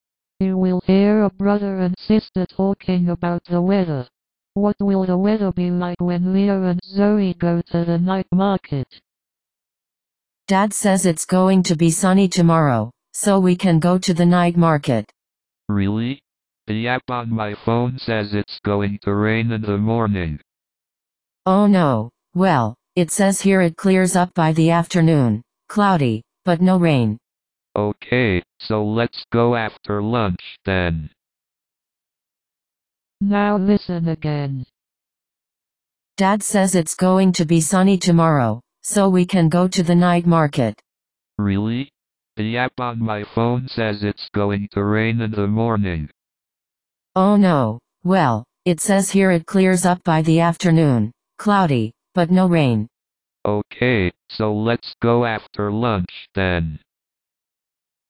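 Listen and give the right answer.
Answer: Cloudy, but no rain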